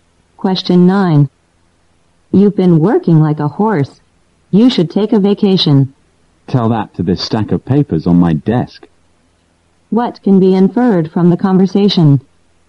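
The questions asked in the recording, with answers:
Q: What can be inferred from the conversation?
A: The speaker has too much work to take a vacation.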